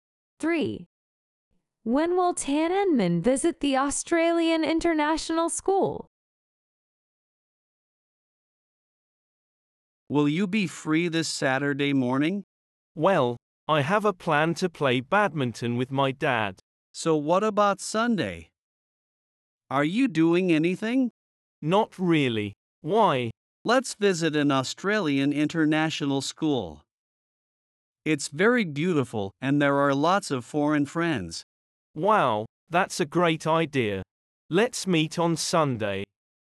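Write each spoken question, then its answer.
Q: When will Tan Enmin visit the Australian International School?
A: On Sunday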